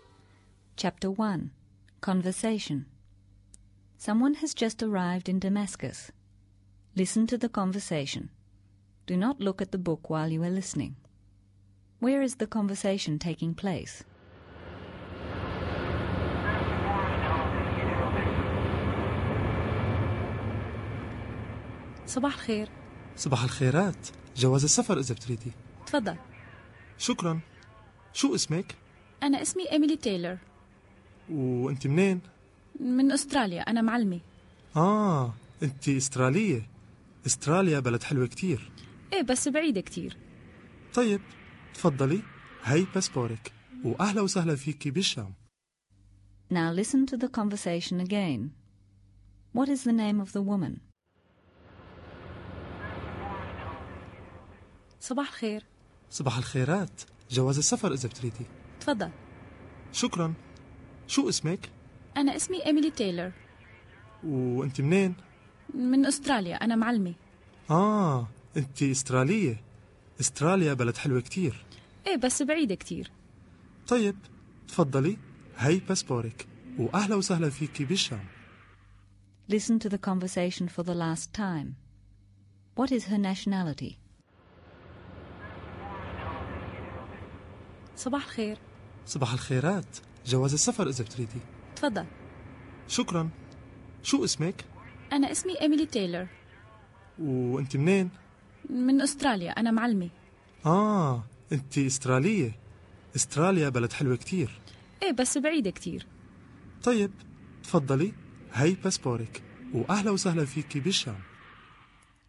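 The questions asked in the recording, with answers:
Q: Where is the conversation taking place?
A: At passport control on arrival in Damascus (al-Sham)

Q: What is the name of the woman?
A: Emily Taylor

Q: What is her nationality?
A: Australian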